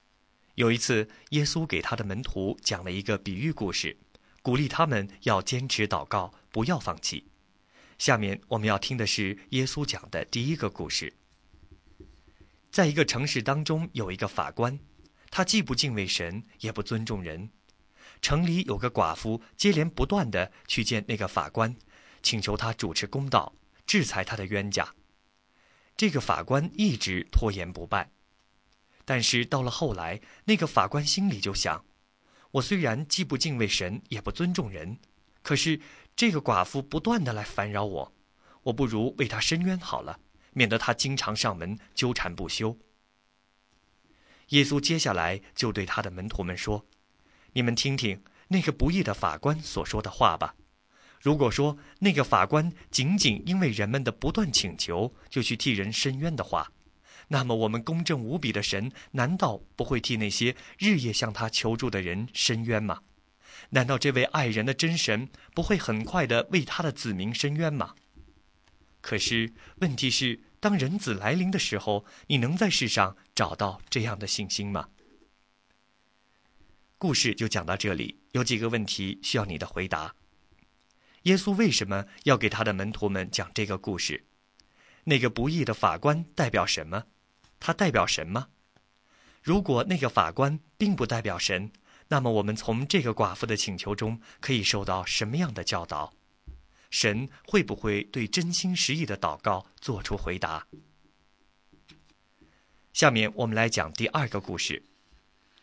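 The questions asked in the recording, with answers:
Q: 耶稣为什么要给他的门徒们讲这个故事?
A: 鼓励他们坚持祷告,不要放弃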